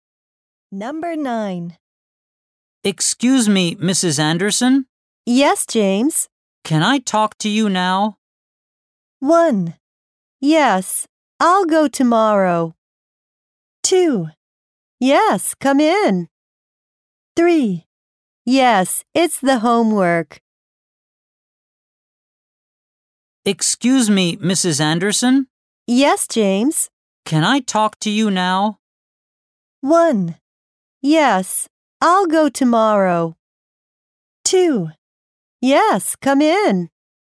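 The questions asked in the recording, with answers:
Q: Can I talk to you now?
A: 2: Yes, come in.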